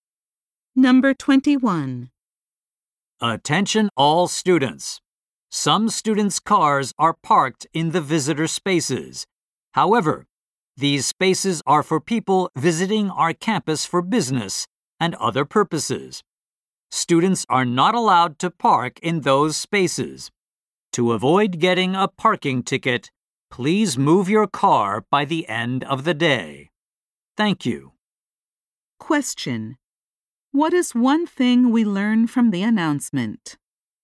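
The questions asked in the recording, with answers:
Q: What is one thing we learn from the announcement?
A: Students must not park in visitor spaces and should move their cars by the end of the day.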